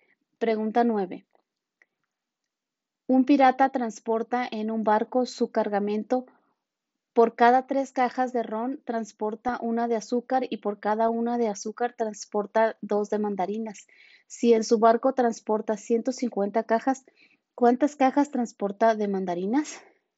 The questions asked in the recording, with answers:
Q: Un pirata transporta en un barco su cargamento por cada tres cajas de ron transporta una de azúcar y por cada una de azúcar transporta dos de mandarinas. Si en su barco transporta 150 cajas, ¿cuántas cajas transporta de mandarinas?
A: Y la respuesta correcta es la B, 50.